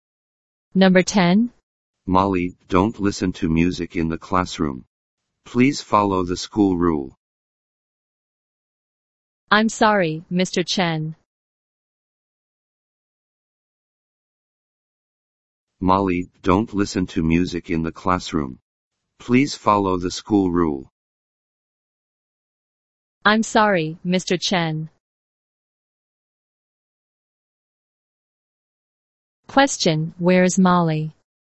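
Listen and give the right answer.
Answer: In the classroom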